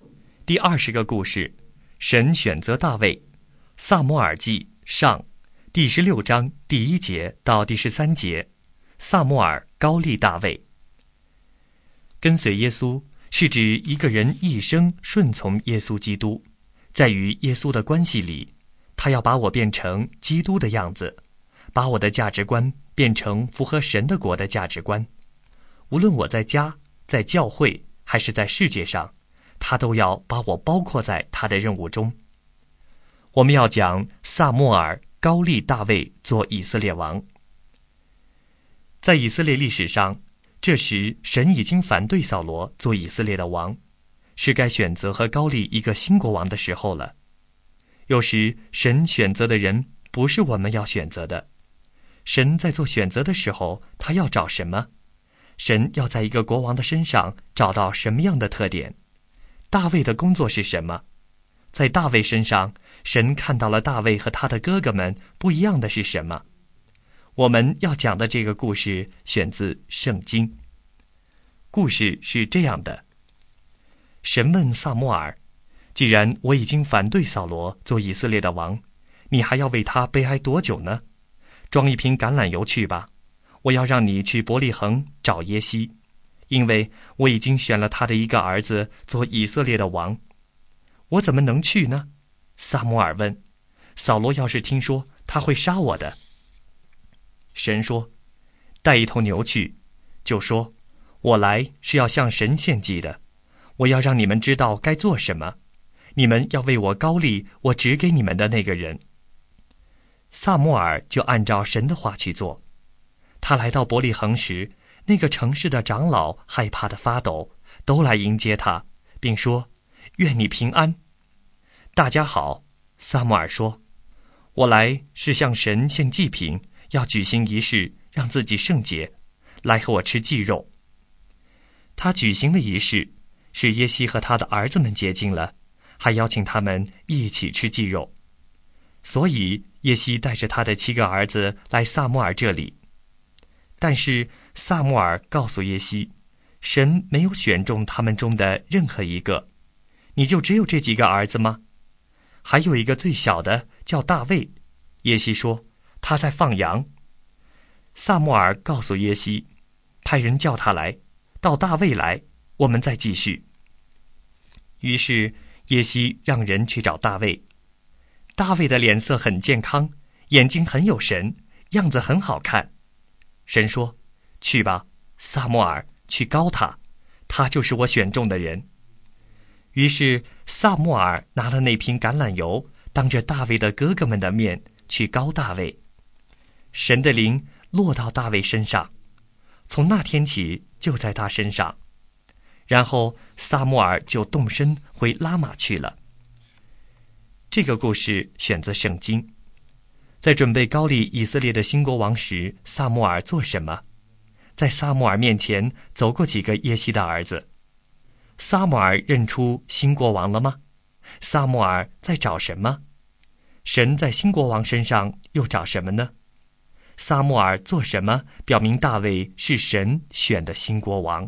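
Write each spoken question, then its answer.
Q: 在撒母耳面前走过几个耶西的儿子。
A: 七个

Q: 撒母耳认出新国王了吗?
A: 没有,神没有选中这七个儿子中的任何一个

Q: 撒母耳做什么表明大卫是神选的新国王?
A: 当着大卫的哥哥们的面用橄榄油膏立大卫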